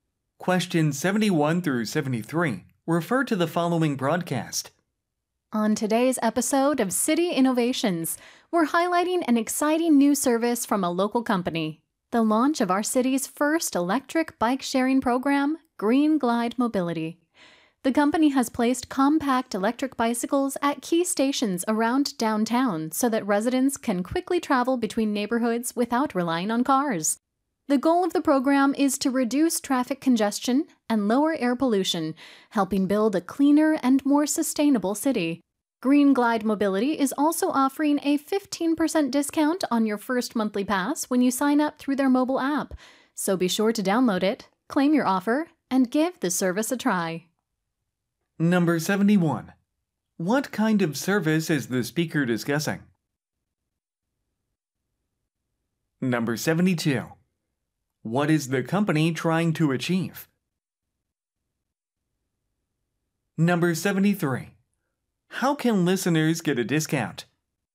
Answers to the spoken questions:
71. Bike sharing. 그래서 B가 정답이 되겠습니다.
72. 72번 C, to support a greener city.
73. 73번 정답은 A, by using the mobile app to register.